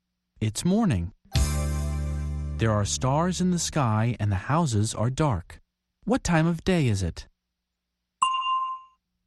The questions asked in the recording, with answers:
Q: What time of day is it?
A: It's night.